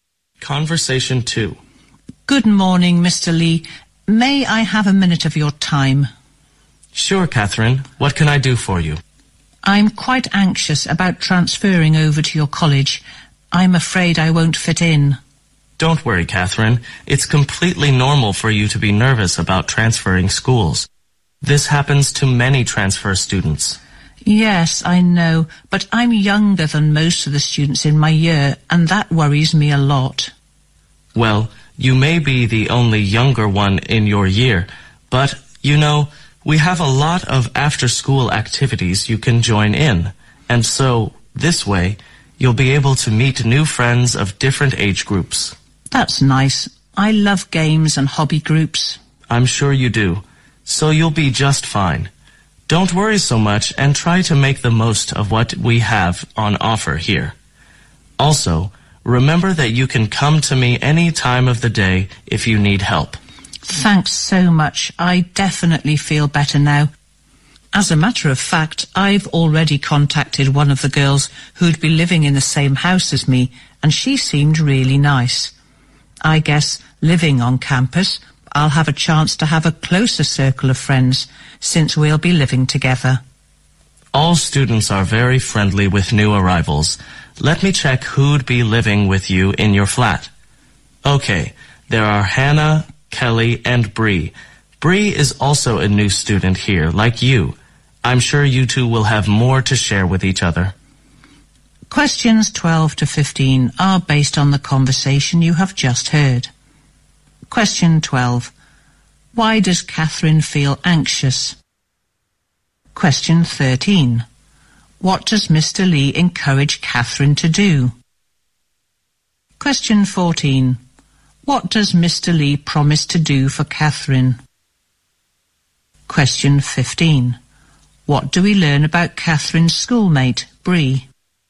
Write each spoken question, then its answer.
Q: Why does Catherine feel anxious?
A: She feels anxious because she is worried about not being able to fit in as a new transfer student.

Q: What does Mr. Lee encourage Catherine to do?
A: Mr. Lee encourages Catherine to join in hobby groups and other after-class activities.

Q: What do we learn about Catherine's schoolmate, Bree?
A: Bree is also a new student, just like Catherine.